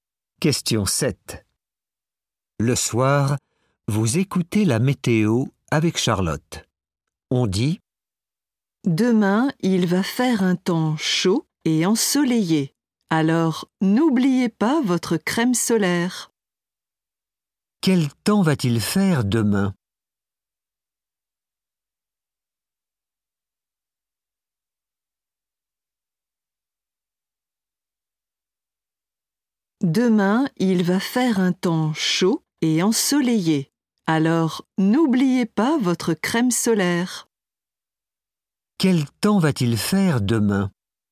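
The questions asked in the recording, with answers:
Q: Quel temps va-t-il faire demain ?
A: Chaud et ensoleillé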